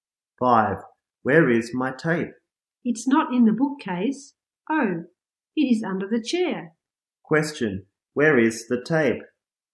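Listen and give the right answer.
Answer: Under the chair.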